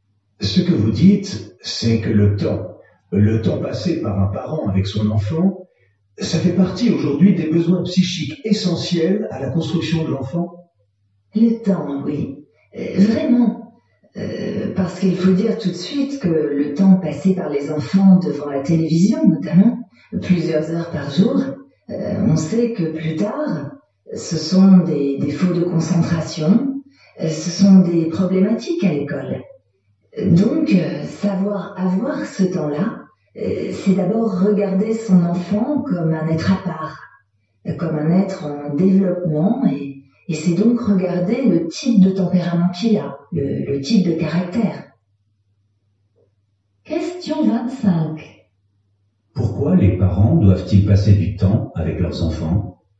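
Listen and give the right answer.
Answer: Parce que c'est un besoin psychique essentiel à la construction de l'enfant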